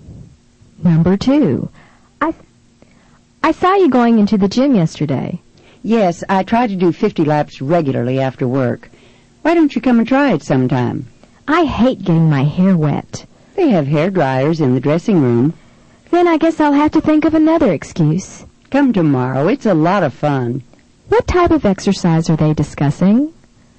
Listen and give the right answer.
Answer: Number two is D, swimming.